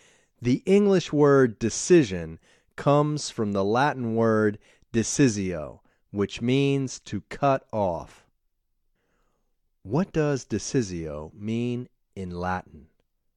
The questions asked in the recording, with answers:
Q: What does decisio mean in Latin?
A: Decisio means to cut off in Latin.